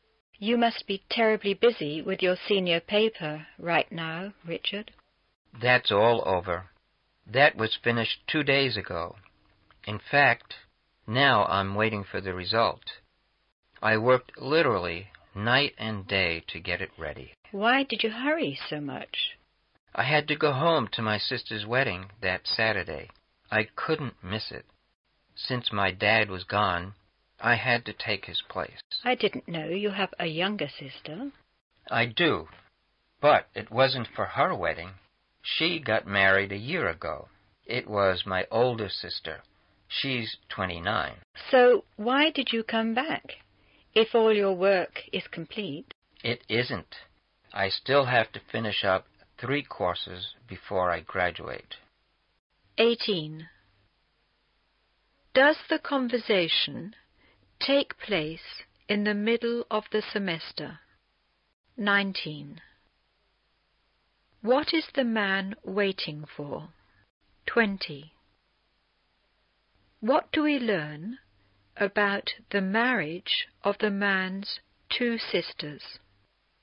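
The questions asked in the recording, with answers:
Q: What is the man waiting for?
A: The result of his senior paper

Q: What do we learn about the marriage of the man's 2 sisters?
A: His younger sister got married a year ago, and his older sister, who is 29, just got married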